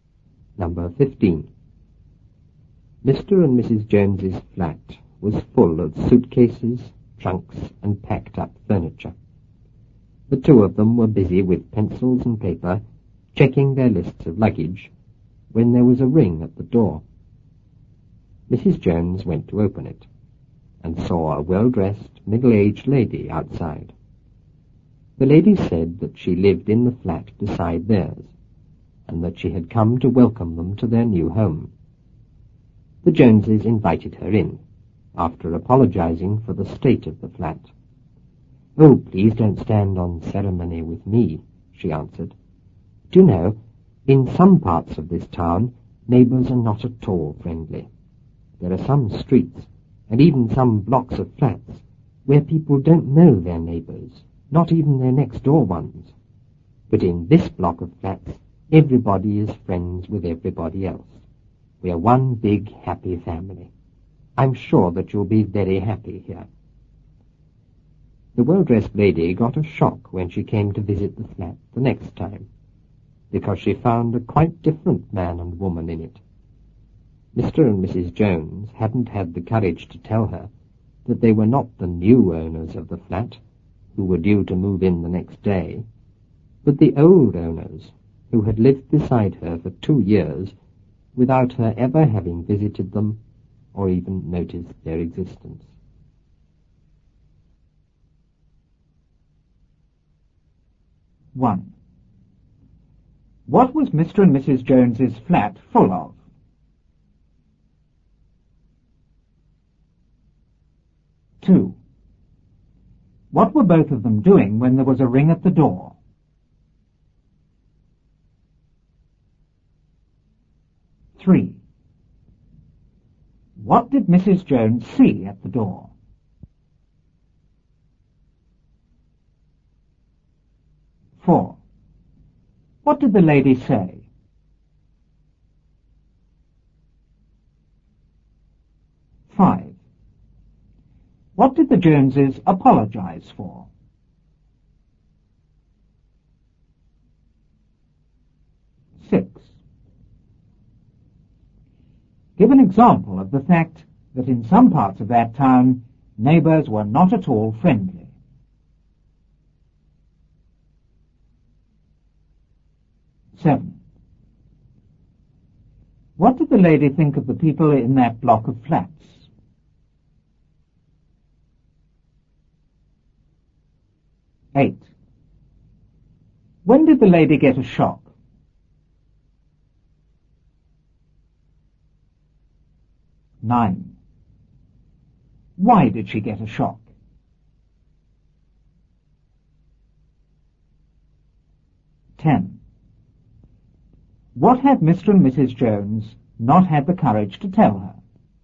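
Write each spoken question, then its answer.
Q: What was Mr. and Mrs. Jones's flat full of?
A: Suitcases, trunks, and packed-up furniture

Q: What were both of them doing when there was a ring at the door?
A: Checking their lists of luggage with pencils and paper

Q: What did Mrs. Jones see at the door?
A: A well-dressed, middle-aged lady

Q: What did the lady say?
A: That she lived in the flat beside theirs and had come to welcome them to their new home

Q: What did the Joneses apologize for?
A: The state of the flat

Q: Give an example of the fact that in some parts of that town, neighbors were not at all friendly.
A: In some streets and blocks of flats, people don't know even their next-door neighbors

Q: What did the lady think of the people in that block of flats?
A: Everybody was friends with everybody else, one big happy family

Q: When did the lady get a shock?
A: When she came to visit the flat the next time

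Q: Why did she get a shock?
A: She found a quite different man and woman in it

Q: What had Mr. and Mrs. Jones not had the courage to tell her?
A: That they were not the new owners but the old owners, who had lived beside her for 2 years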